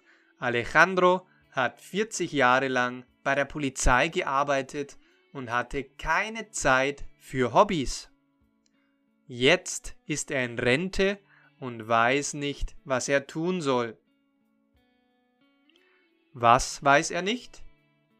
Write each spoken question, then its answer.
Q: Was weiß er nicht?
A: Was er tun soll. Alejandro weiß nicht, was er tun soll.